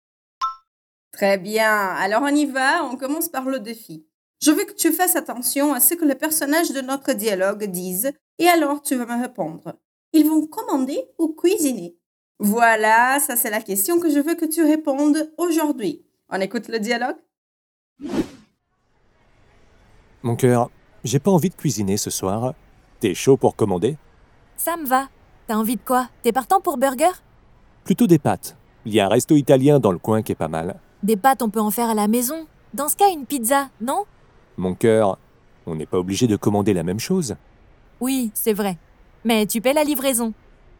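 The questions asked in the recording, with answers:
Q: Ils vont commander ou cuisiner?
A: Commander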